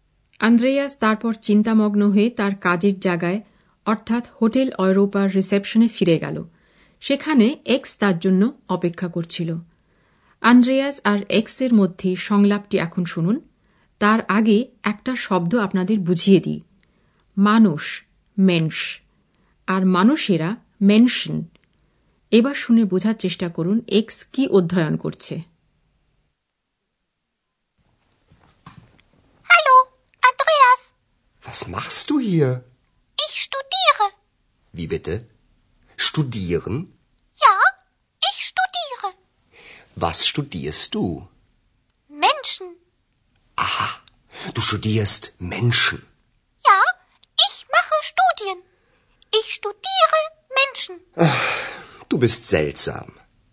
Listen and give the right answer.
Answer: এক্সের অধ্যয়নের বিষয় হল মানুষ